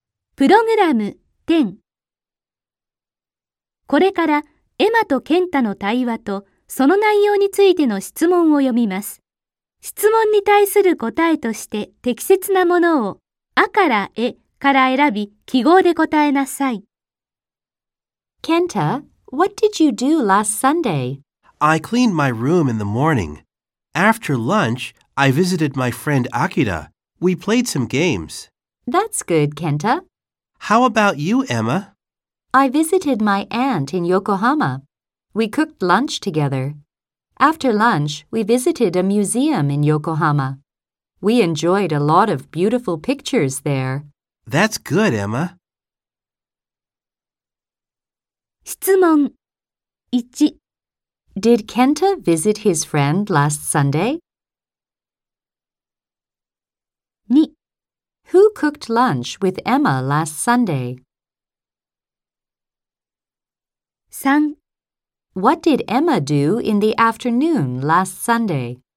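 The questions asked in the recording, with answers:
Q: Did Kenta visit his friend last Sunday?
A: Yes, he did.

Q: Who cooked lunch with Emma last Sunday?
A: Her aunt.

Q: What did Emma do in the afternoon last Sunday?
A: She visited a museum in Yokohama.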